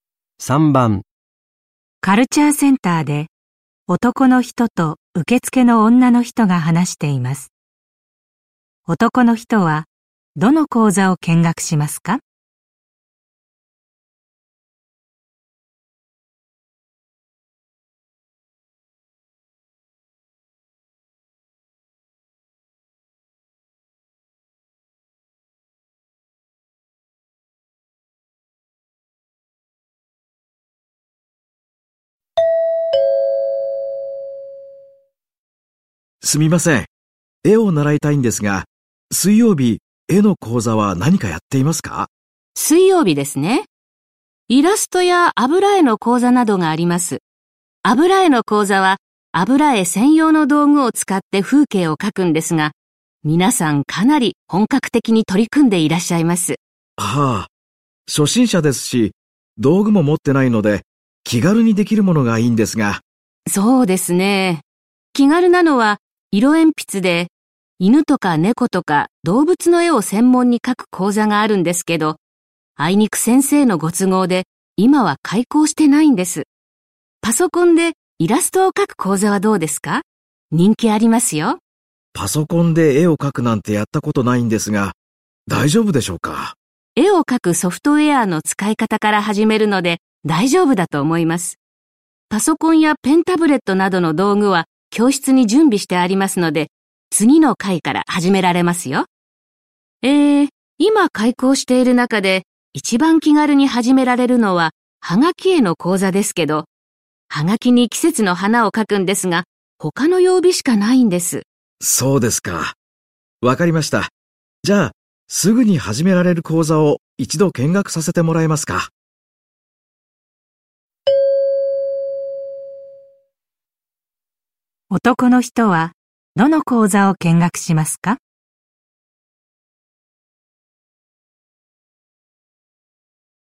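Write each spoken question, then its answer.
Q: 男の人はどの講座を見学しますか?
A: パソコンでイラストを描く講座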